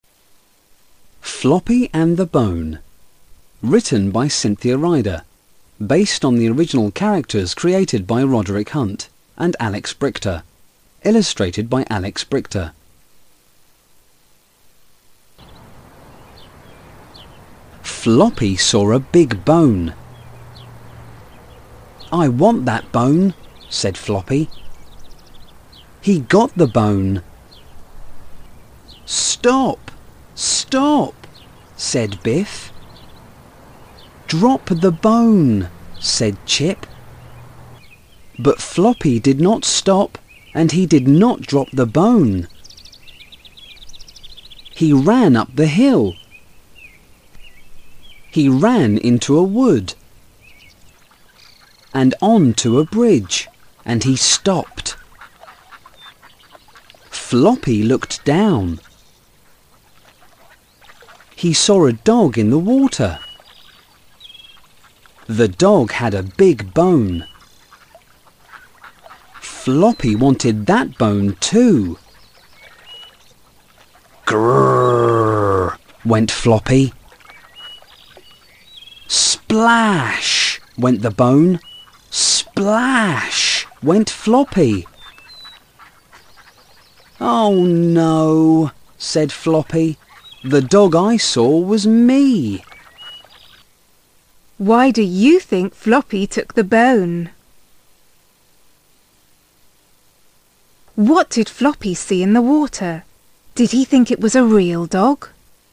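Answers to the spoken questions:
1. A dog with a big bone (his own reflection)
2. Yes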